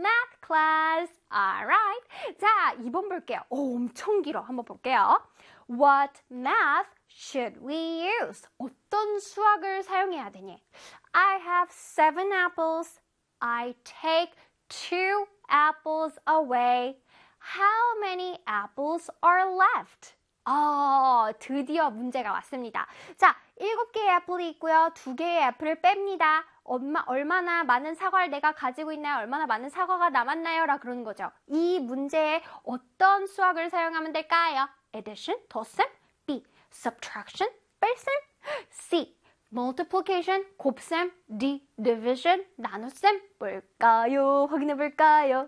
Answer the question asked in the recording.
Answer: 뺄셈은 영어로 subtraction입니다.